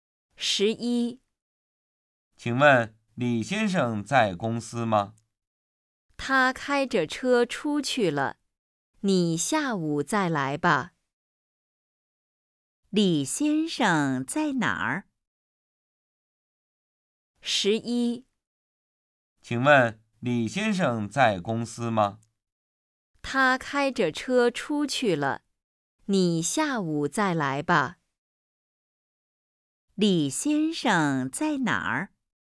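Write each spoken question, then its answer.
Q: 李先生在哪儿?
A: 开着车出去了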